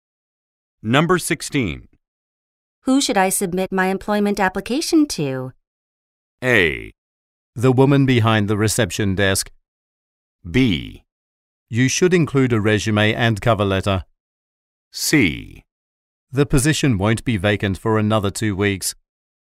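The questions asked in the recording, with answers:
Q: Who should I submit my employment application to?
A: A: The woman behind the reception desk.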